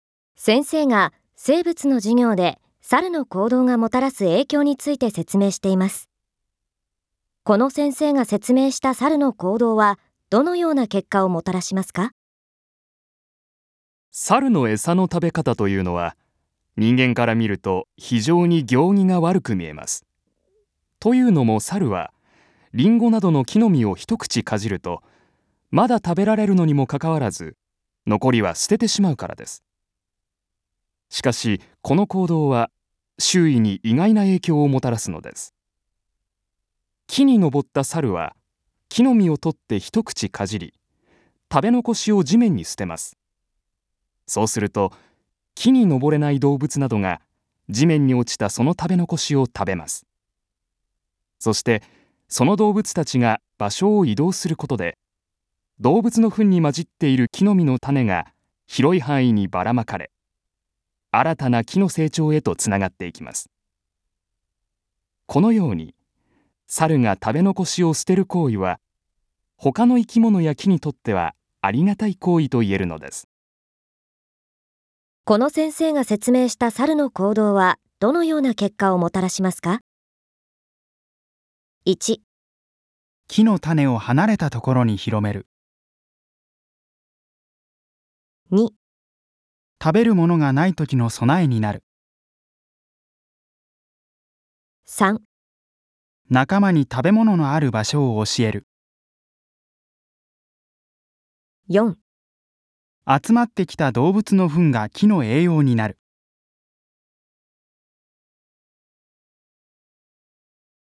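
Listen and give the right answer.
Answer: 1: 木の種を離れたところに広める。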